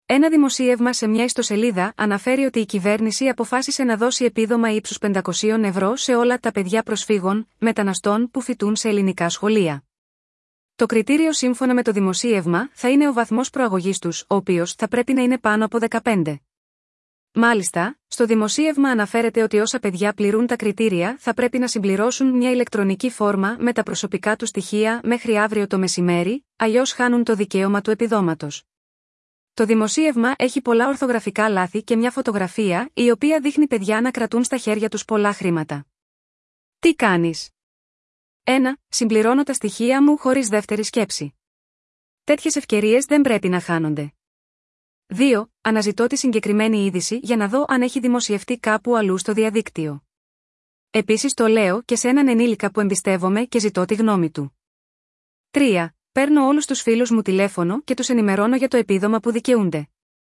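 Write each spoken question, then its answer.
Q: Τι κάνεις?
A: 2: Αναζητώ τη συγκεκριμένη είδηση για να δω αν έχει δημοσιευτεί κάπου αλλού στο διαδίκτυο.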